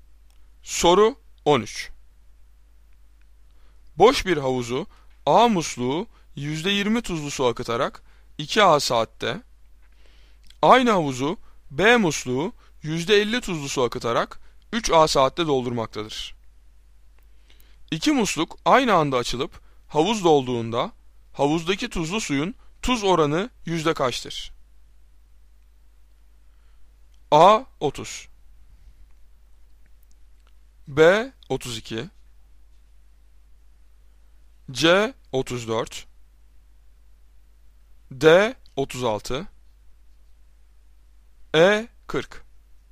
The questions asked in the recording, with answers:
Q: İki musluk aynı anda açılıp havuz dolduğunda havuzdaki tuzlu suyun tuz oranı yüzde kaçtır?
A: Doğru cevap B 32.